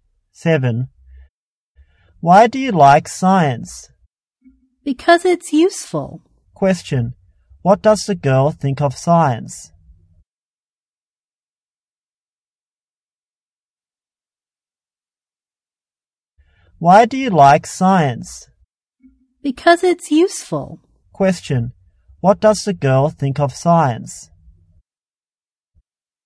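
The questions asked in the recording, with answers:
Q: Question, what does the girl think of science?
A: It's useful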